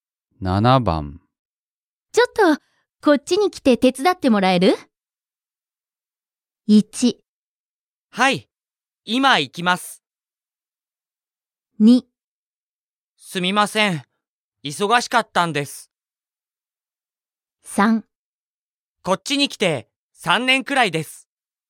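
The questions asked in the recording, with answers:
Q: ちょっと、こっちに来て手伝ってもらえる?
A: 1: はい、今行きます。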